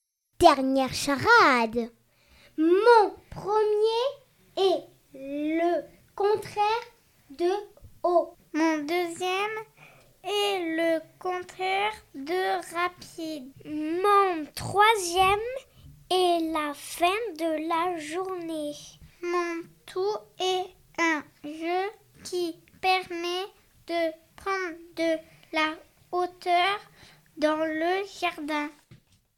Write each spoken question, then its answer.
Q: Mon tout est un jeu qui permet de prendre de la hauteur dans le jardin.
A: Je suis une balançoire.